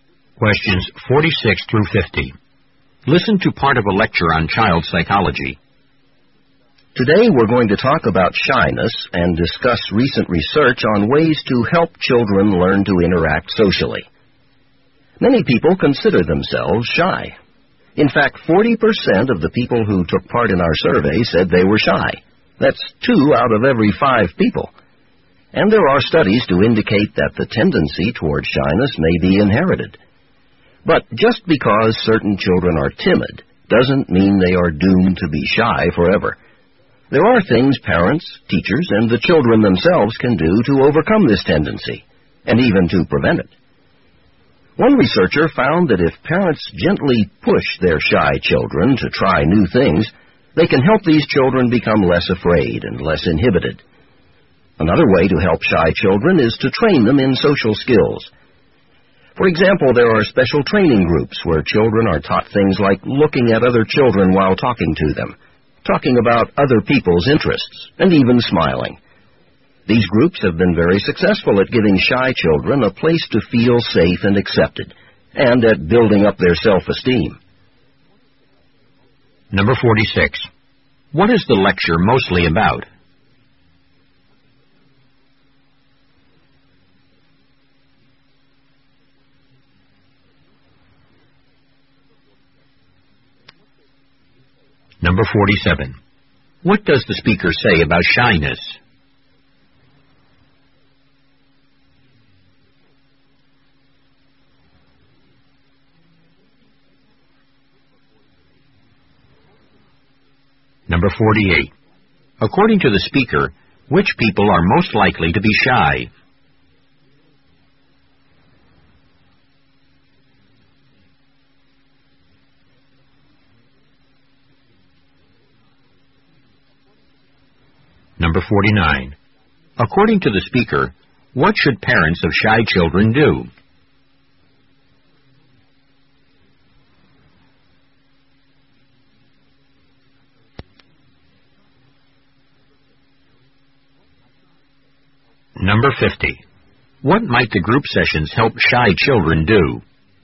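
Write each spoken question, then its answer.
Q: What is the lecture mostly about?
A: Ways to help children overcome shyness

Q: According to the speaker, what should parents of shy children do?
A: Gently push them to try new things

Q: What might the group sessions help shy children do?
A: Learn social skills and build self-esteem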